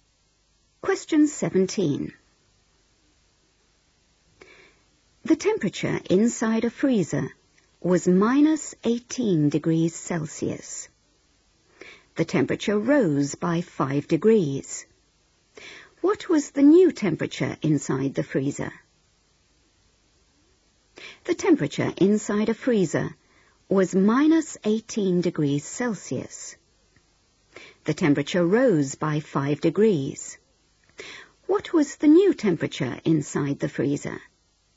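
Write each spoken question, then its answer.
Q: What was the new temperature inside the freezer?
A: -13°C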